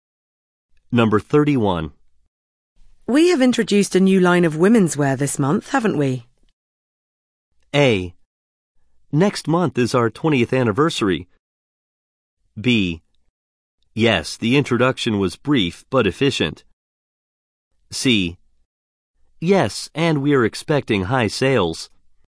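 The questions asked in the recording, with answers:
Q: We have introduced a new line of women's wear this month, haven't we?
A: C: Yes, and we are expecting high sales.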